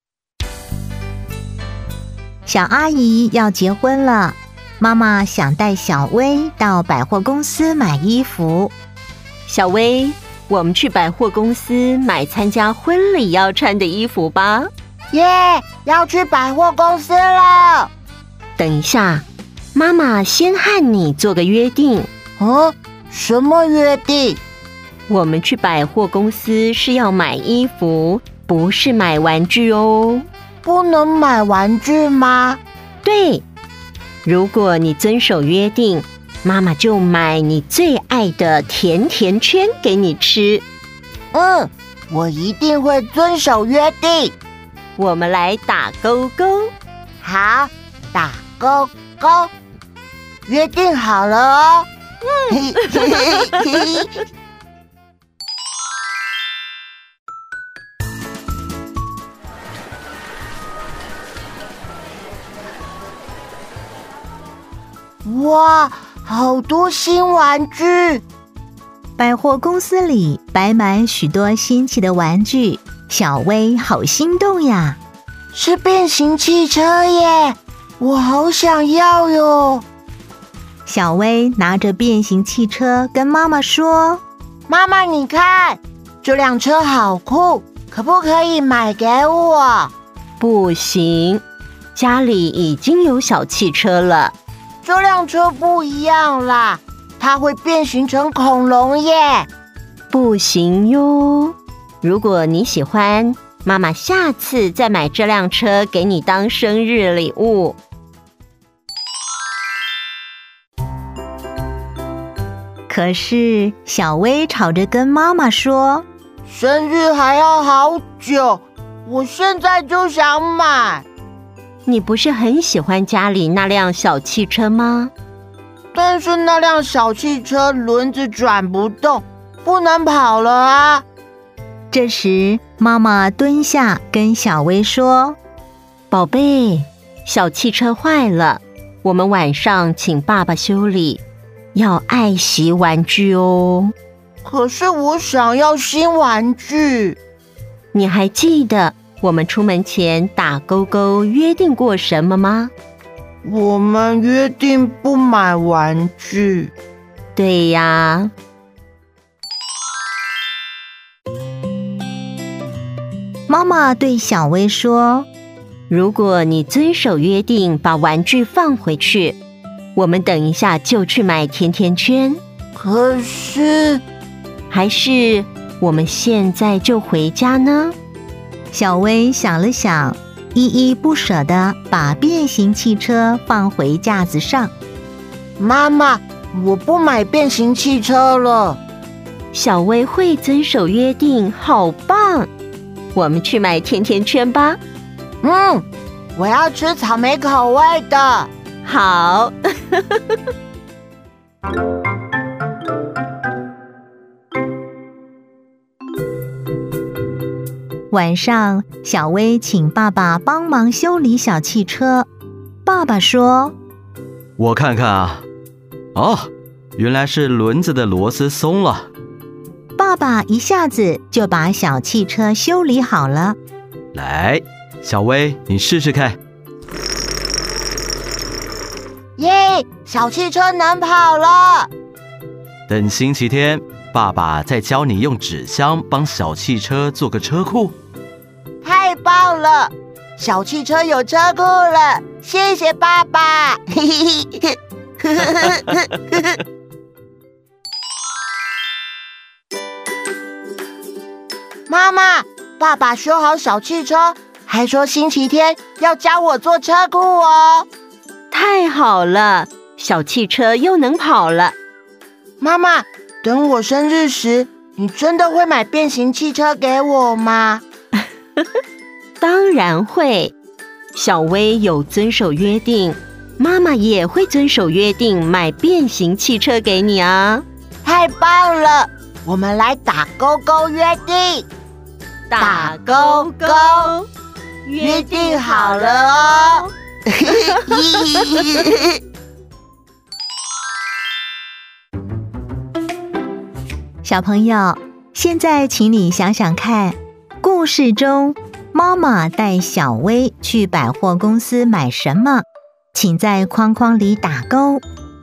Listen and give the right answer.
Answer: 衣服。